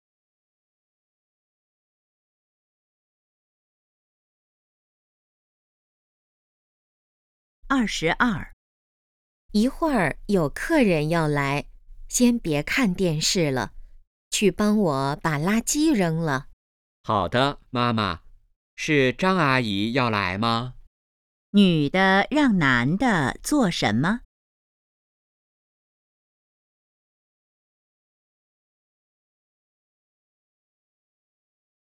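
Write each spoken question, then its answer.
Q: 女的让男的做什么?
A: 扔垃圾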